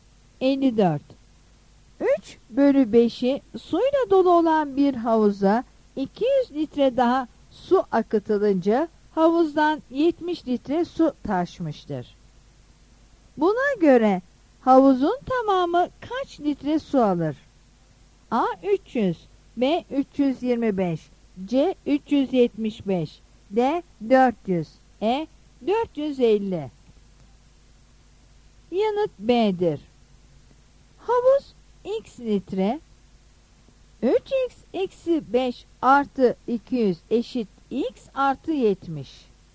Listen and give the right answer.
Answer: Yanıt B'dir.